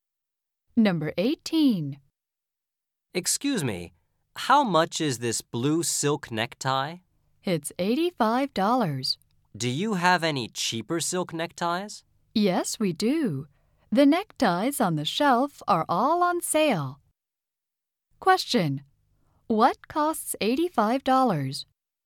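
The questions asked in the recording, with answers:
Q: What costs $85?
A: The blue silk necktie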